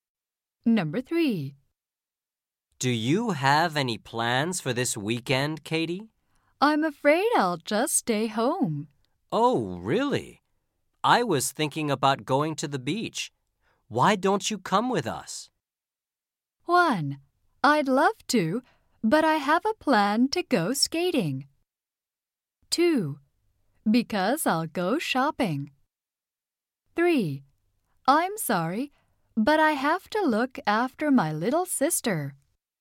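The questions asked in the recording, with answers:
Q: Why don't you come with us?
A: 3: I'm sorry.But I have to look after my little sister.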